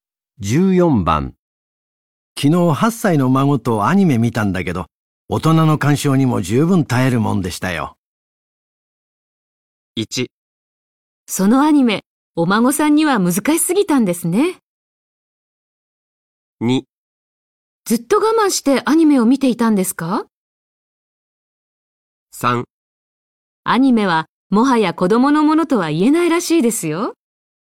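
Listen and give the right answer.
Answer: 3: アニメはもはや子供のものとは言えないらしいですよ。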